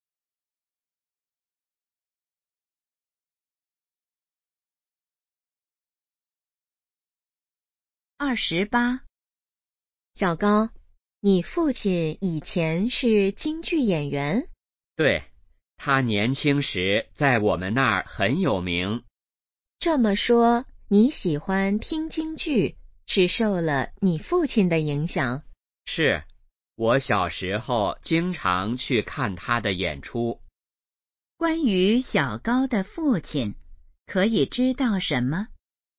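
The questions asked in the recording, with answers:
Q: 关于小高的父亲,可以知道什么?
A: 以前是京剧演员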